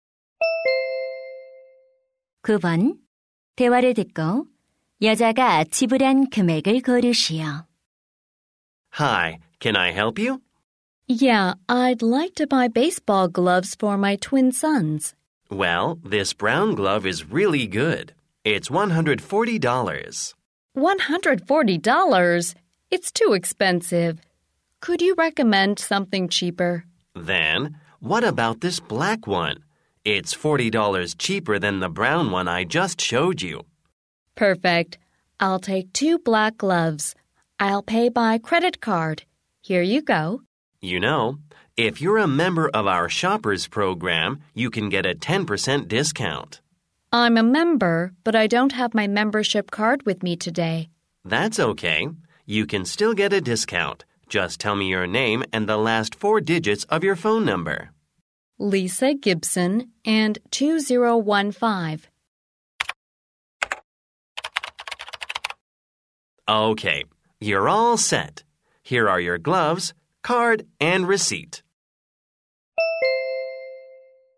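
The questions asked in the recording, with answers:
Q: 대화를 듣고 여자가 지불한 금액을 고르시오.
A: $180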